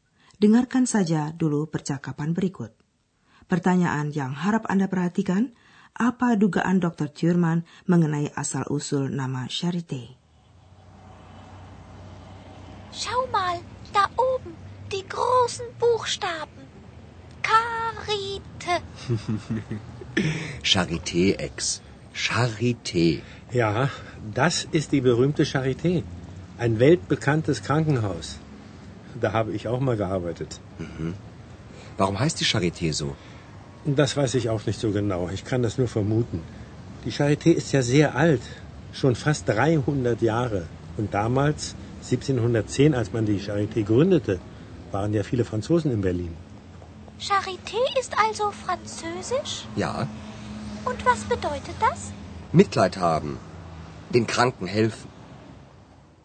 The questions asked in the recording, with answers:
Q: apa dugaan Dr. Thurman mengenai asal-usul nama Charité?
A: Kata charité berasal dari bahasa Prancis.